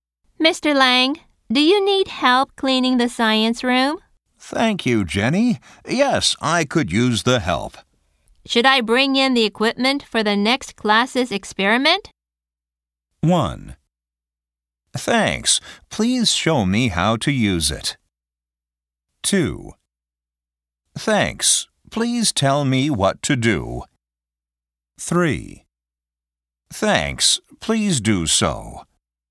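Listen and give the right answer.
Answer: 3: Thanks. Please do so.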